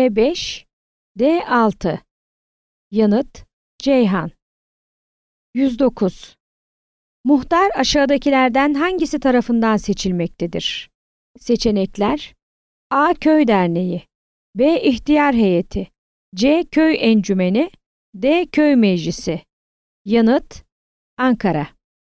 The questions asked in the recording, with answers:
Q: Muhtar aşağıdakilerden hangisi tarafından seçilmektedir?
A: Yanıt: Ankara.